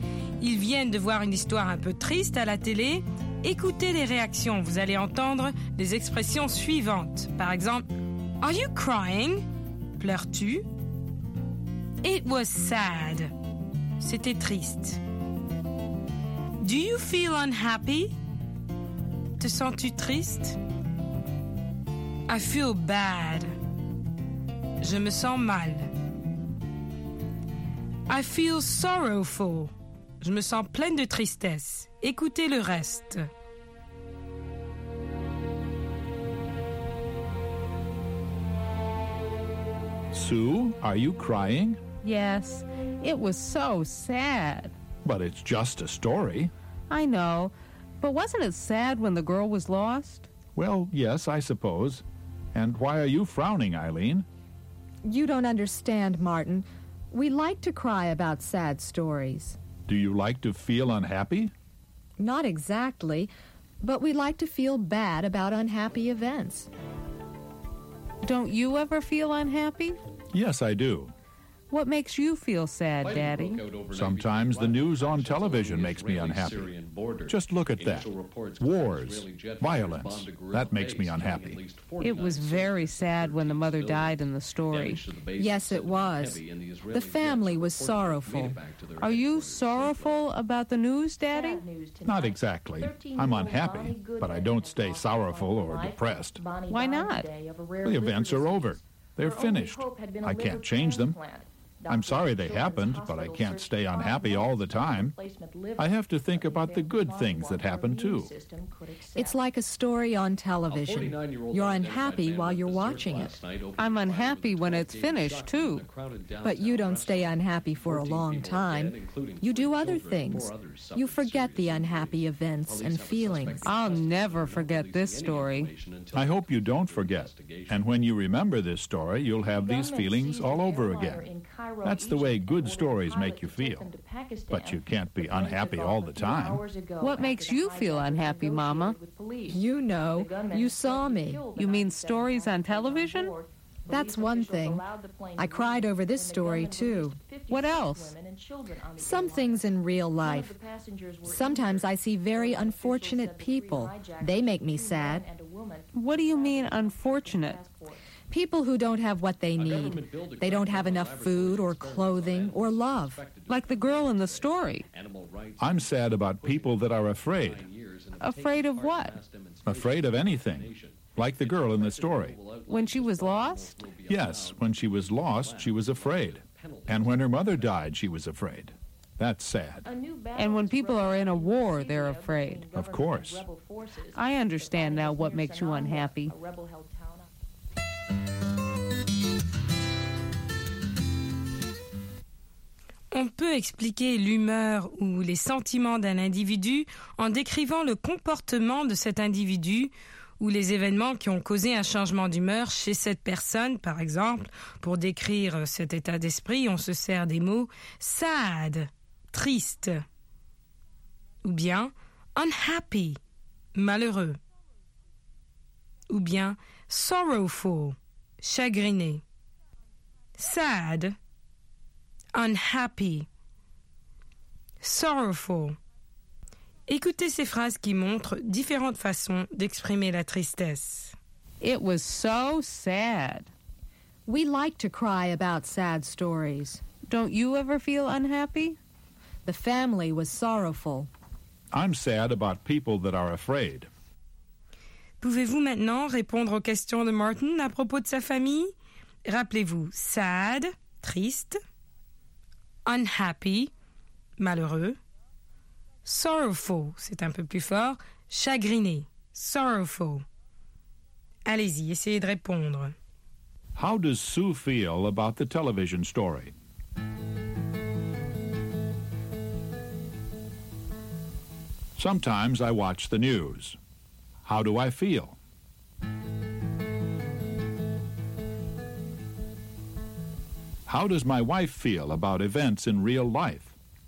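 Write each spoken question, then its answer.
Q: How does Sue feel about the television story?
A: She feels sad; she cried because the story was so sad.

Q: How do I feel?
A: Unhappy, but not sorrowful or depressed for long.

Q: How does my wife feel about events in real life?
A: Sad about unfortunate people and people who are afraid.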